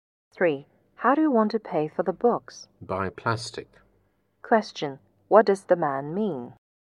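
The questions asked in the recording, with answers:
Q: What does the man mean?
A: He will pay by credit card.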